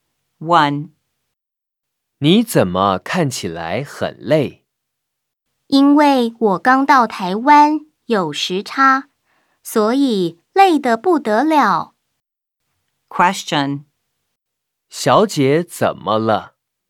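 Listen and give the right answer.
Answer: 她刚到台湾,有时差,很累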